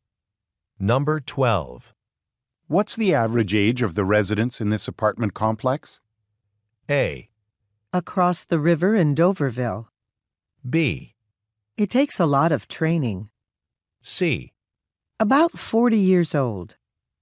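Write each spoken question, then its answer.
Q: What's the average age of the residents in this apartment complex?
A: C: About 40 years old.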